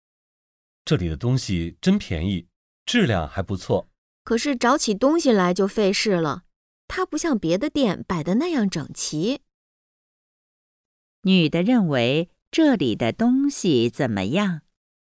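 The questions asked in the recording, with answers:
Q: 女的认为这里的东西怎么样?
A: 便宜,质量还不错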